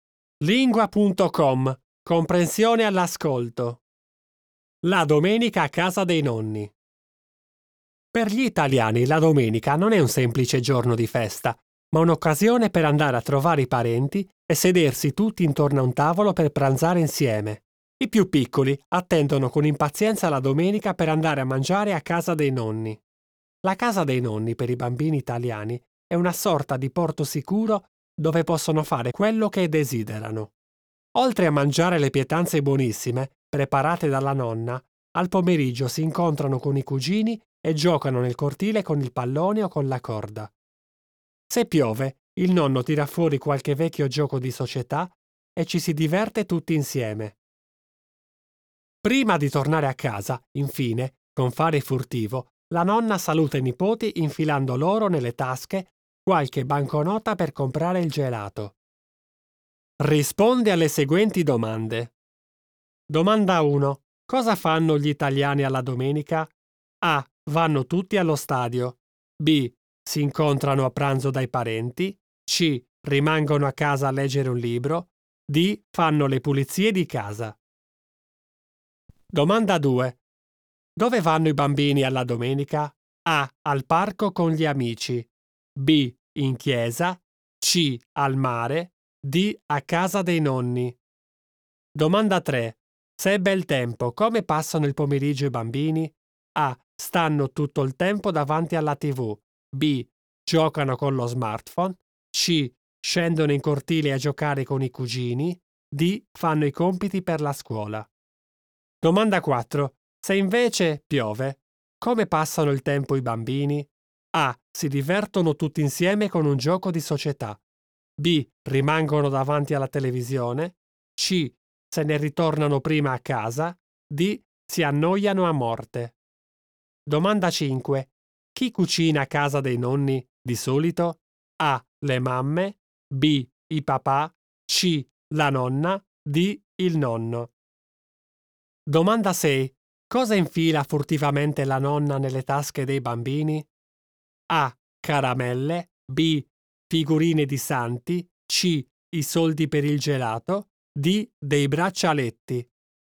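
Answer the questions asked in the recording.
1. B: Si incontrano a pranzo dai parenti.
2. D: A casa dei nonni.
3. C: Scendono in cortile a giocare con i cugini.
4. A: Si divertono tutti insieme con un gioco di società.
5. C: La nonna.
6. C: I soldi per il gelato.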